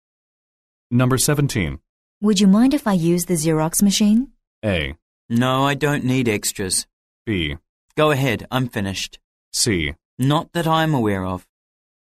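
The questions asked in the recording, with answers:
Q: Would you mind if I use the Xerox machine?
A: B: Go ahead, I'm finished.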